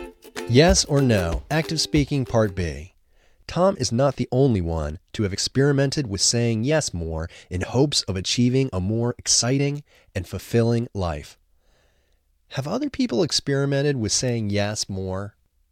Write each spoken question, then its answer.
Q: Have other people experimented with saying yes more?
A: Yes, other people have experimented with saying yes more.